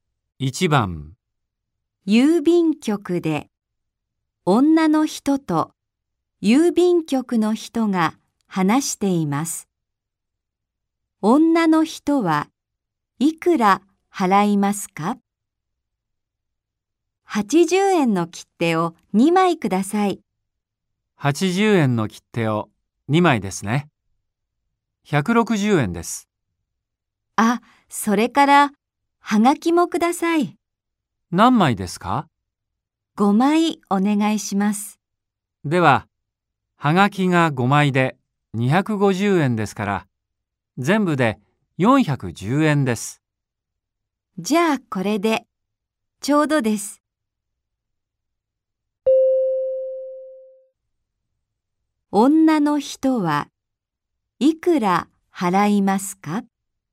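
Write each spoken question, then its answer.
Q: 女の人はいくら払いますか?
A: 410円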